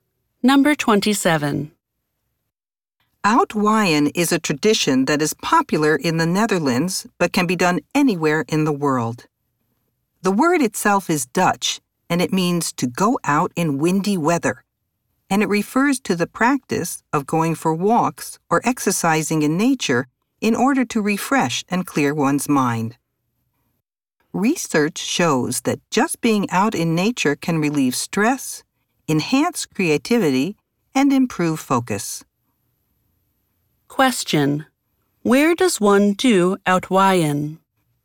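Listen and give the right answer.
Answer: Outdoors in nature, especially in windy weather (anywhere in the world)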